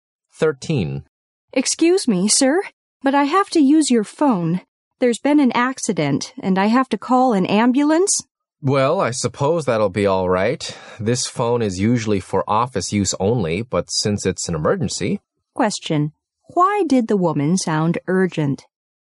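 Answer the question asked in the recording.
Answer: There had been an accident and she needed to call an ambulance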